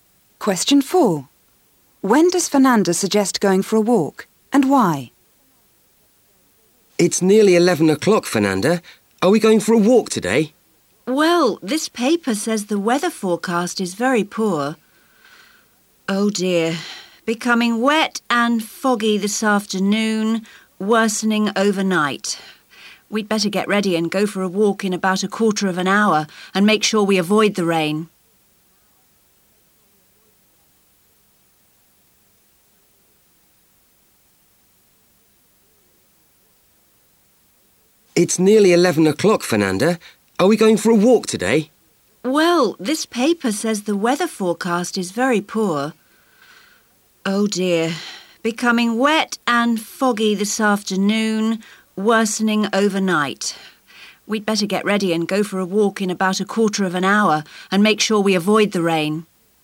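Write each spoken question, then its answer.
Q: When does Fernanda suggest going for a walk and why?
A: In about a quarter of an hour, to avoid the rain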